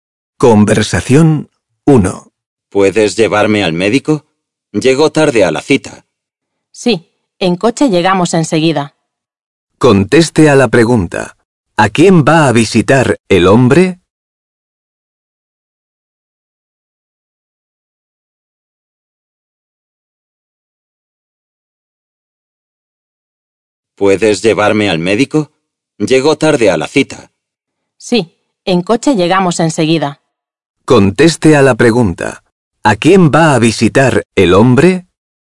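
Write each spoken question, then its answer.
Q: ¿A quién va a visitar el hombre?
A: Al médico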